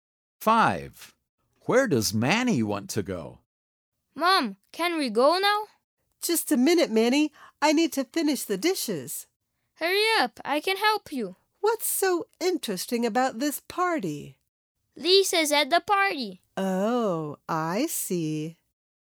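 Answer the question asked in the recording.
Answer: To the party.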